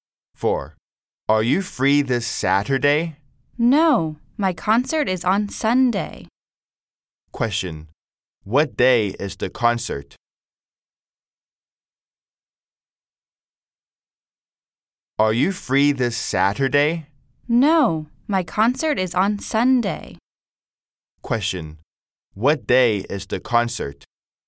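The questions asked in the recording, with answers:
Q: Question, what day is the concert?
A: Sunday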